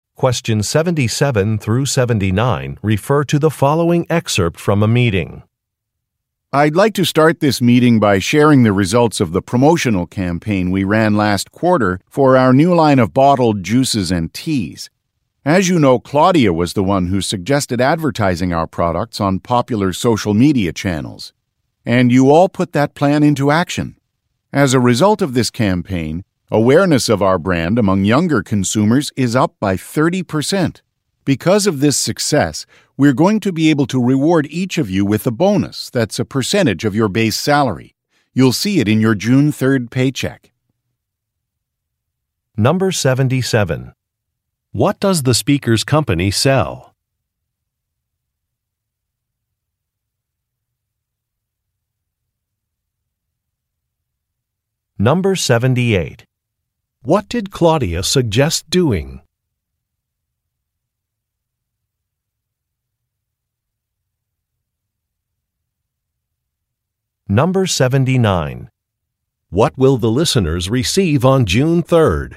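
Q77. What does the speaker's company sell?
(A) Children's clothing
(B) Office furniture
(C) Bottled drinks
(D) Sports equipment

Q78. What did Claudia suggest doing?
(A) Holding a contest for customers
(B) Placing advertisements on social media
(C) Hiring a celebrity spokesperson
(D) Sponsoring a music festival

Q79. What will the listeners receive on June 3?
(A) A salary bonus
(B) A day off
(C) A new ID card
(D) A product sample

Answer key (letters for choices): 77C, 78B, 79A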